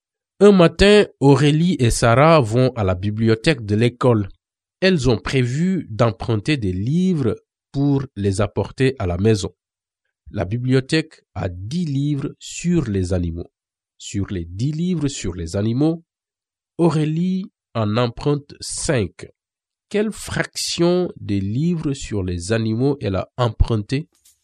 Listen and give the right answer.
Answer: Donc, elle a emprunté 5 sur 10.